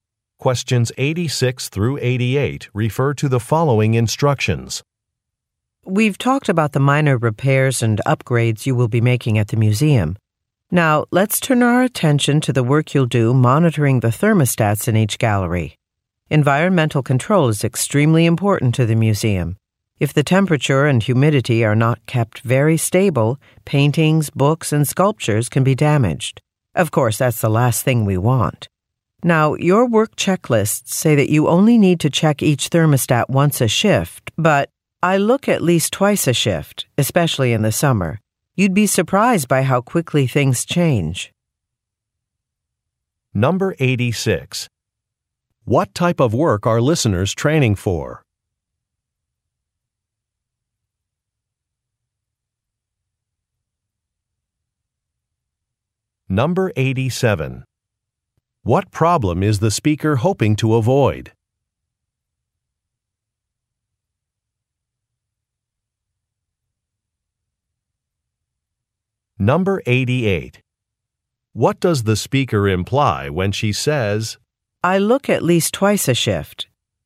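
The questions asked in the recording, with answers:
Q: What type of work are listeners training for?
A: Maintenance work at a museum

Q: What problem is the speaker hoping to avoid?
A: Damage to artwork from unstable temperature and humidity

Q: What does the speaker imply when she says,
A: Listeners should check the thermostats more often than the checklist says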